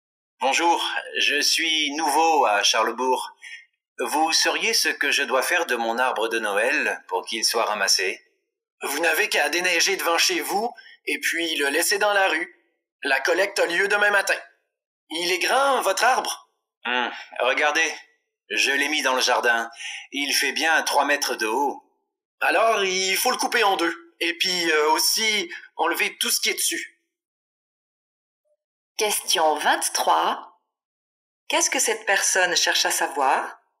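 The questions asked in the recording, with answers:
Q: Qu'est-ce que cette personne cherche à savoir ?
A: Ce qu'elle doit faire de son arbre de Noël pour qu'il soit ramassé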